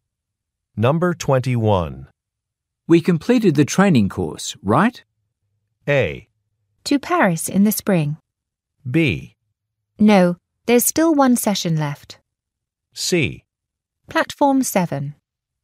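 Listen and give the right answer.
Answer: B: No, there's still one session left.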